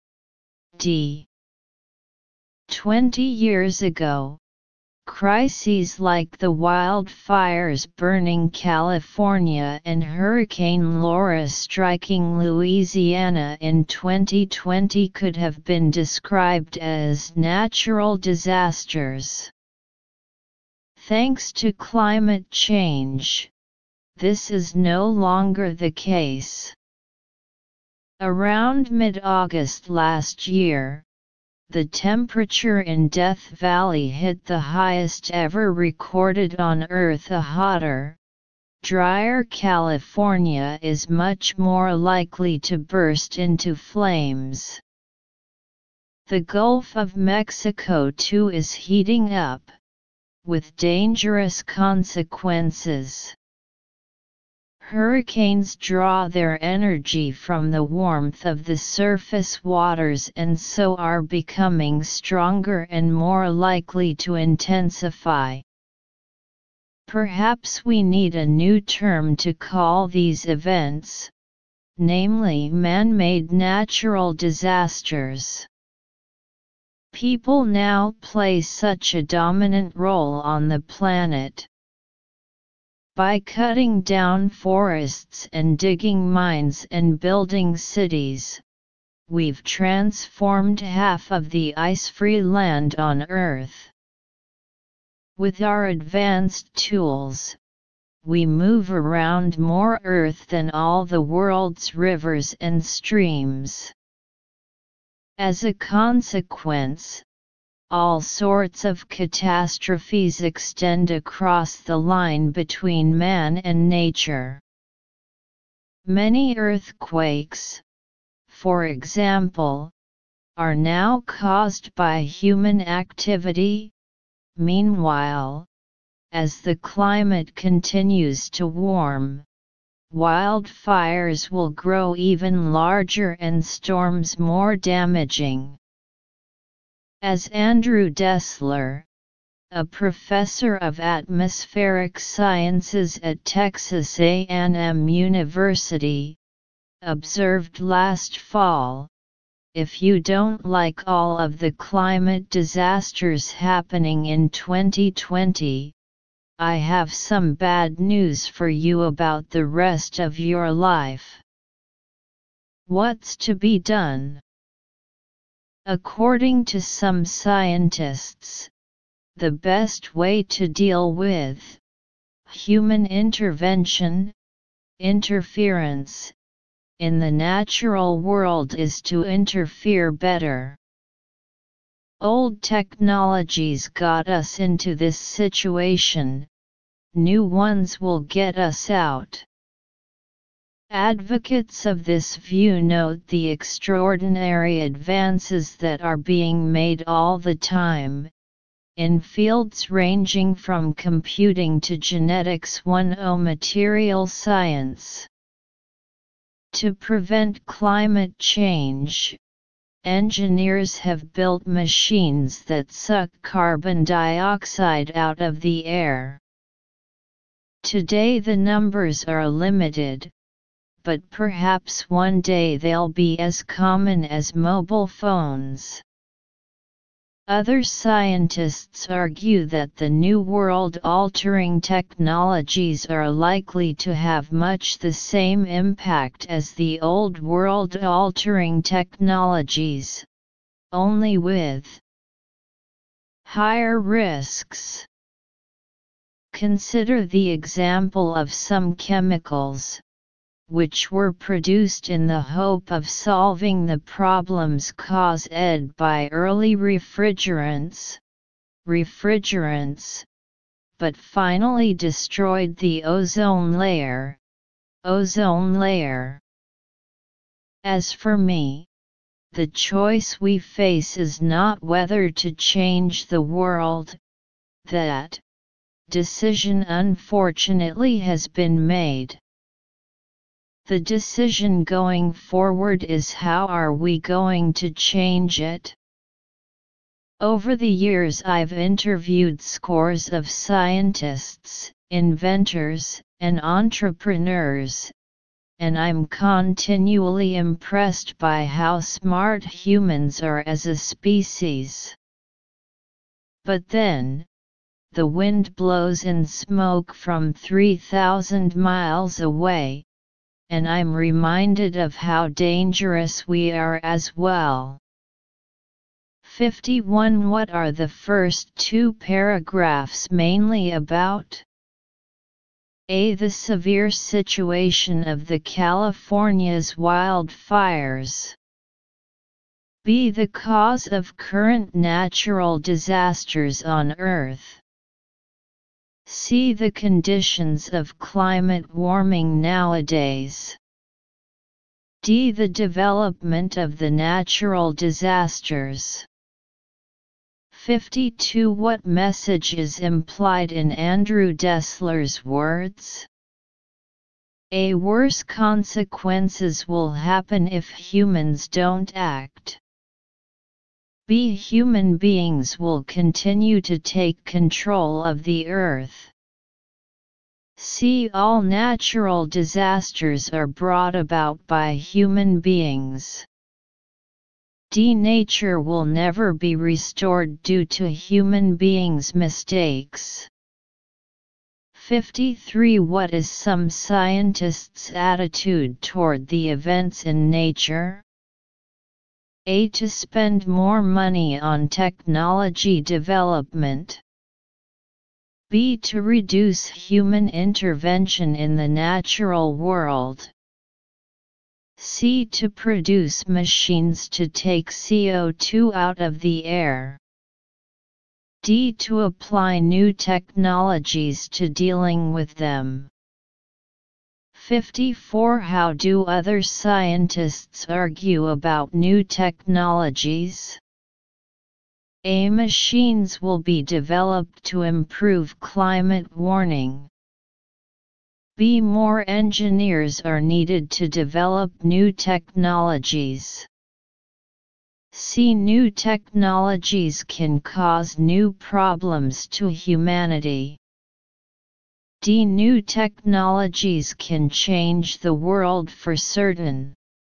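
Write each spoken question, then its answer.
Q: What are the first two paragraphs mainly about?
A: B: The cause of current natural disasters on Earth.

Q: What message is implied in Andrew Dessler's words?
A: A: Worse consequences will happen if humans don't act.

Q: What is some scientists' attitude toward the events in nature?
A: D: To apply new technologies to dealing with them.

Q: How do other scientists argue about new technologies?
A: C: New technologies can cause new problems to humanity.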